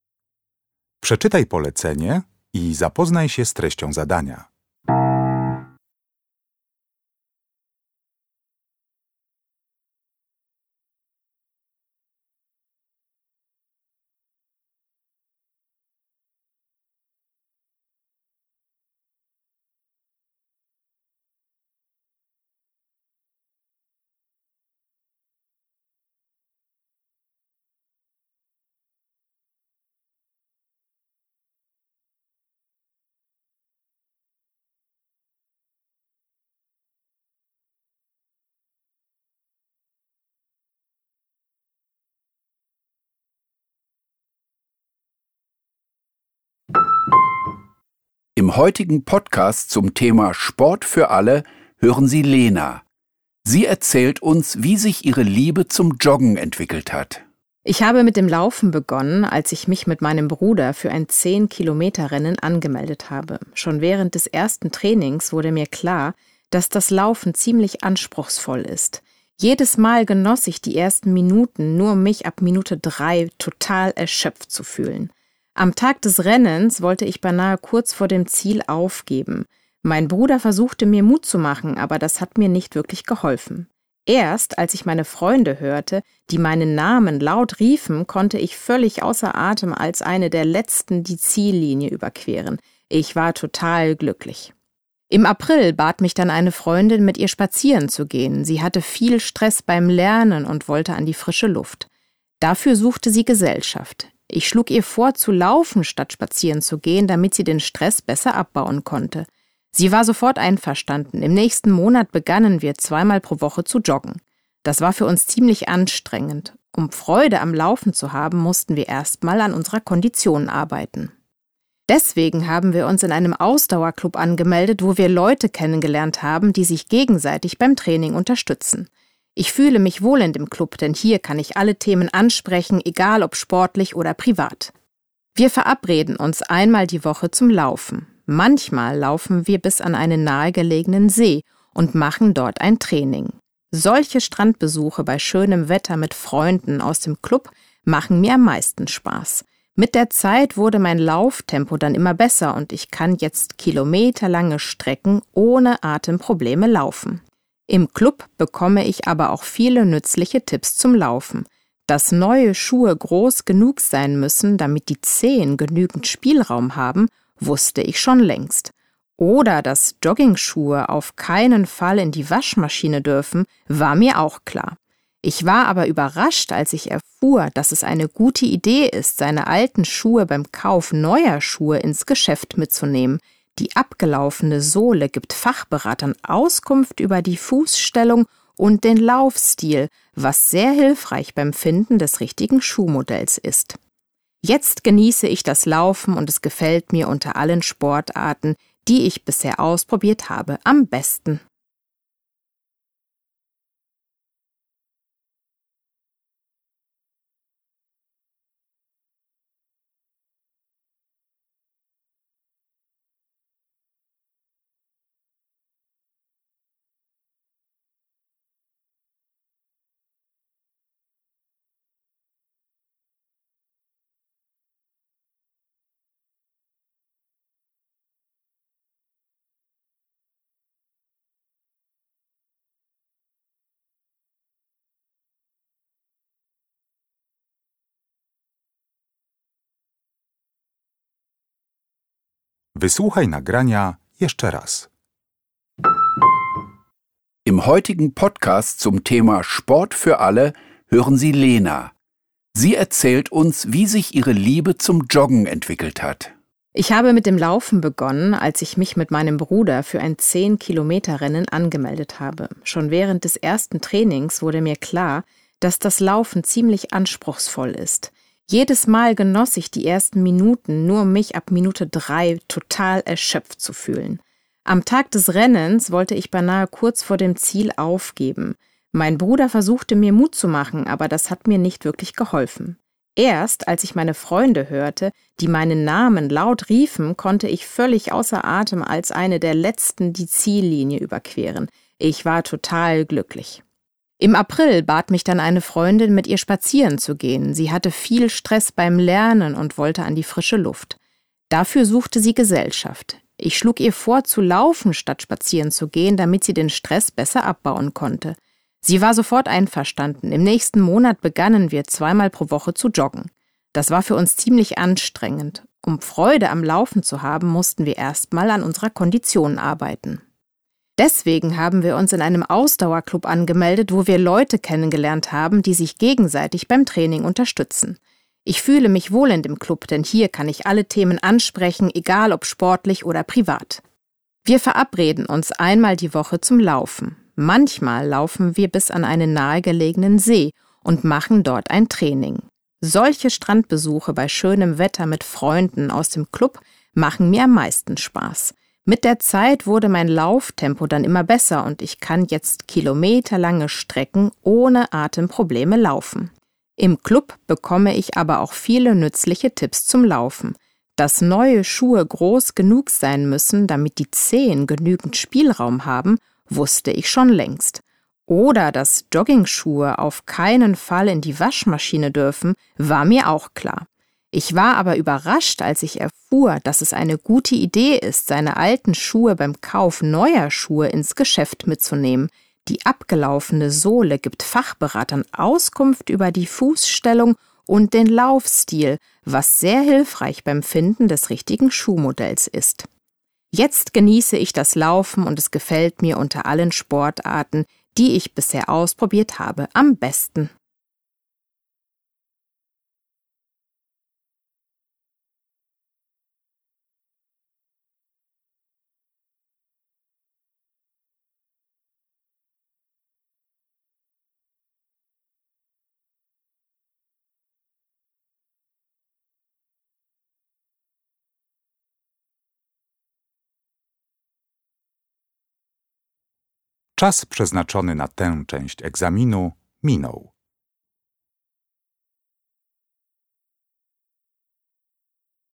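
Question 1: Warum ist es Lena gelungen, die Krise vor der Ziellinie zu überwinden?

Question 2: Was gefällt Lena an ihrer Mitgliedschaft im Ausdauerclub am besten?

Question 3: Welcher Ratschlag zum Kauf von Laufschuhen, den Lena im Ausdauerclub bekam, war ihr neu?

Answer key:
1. Weil ihre Freunde laut ihren Namen riefen.
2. Die Strandbesuche am See bei schönem Wetter mit Freunden aus dem Club.
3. Beim Kauf neuer Schuhe die alten Schuhe ins Geschäft mitzunehmen.

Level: Poziom: rozszerzony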